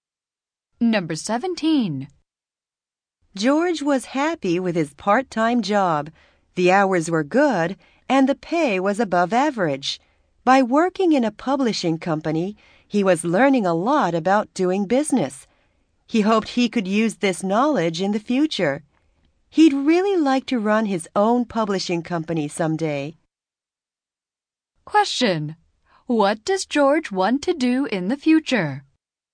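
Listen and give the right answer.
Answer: Run his own publishing company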